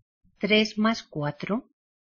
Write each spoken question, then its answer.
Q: ¿Tres más cuatro?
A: Seven.